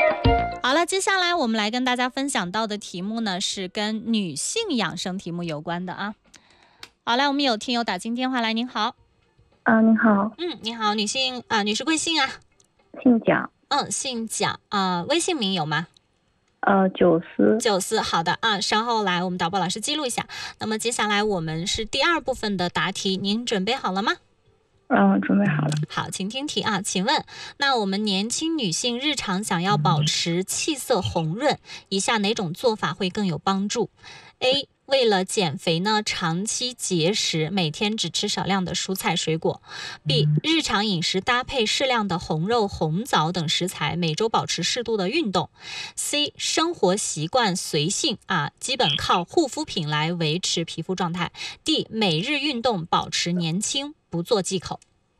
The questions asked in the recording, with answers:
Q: 请问,那我们年轻女性日常想要保持气色红润,以下哪种做法会更有帮助?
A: 选 B。